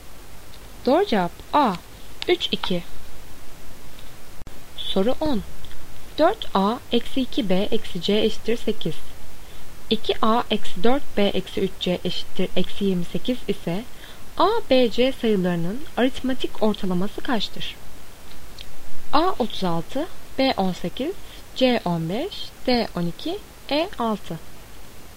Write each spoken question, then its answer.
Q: 2a eksi 4b eksi 3c eşittir eksi 28 ise a, b, c sayılarının aritmetik ortalaması kaçtır?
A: Doğru cevap E 6.